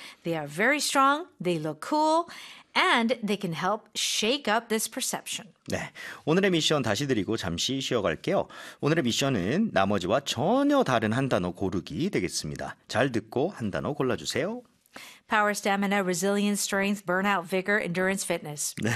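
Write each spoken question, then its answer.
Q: 오늘의 미션은 나머지와 전혀 다른 한 단어 고르기 되겠습니다.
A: burnout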